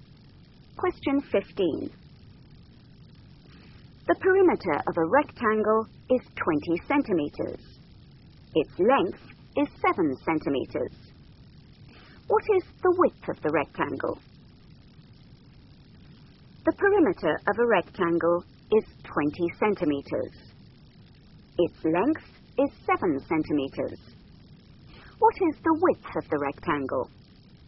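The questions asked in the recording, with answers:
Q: What is the width of the rectangle?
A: 3 centimeters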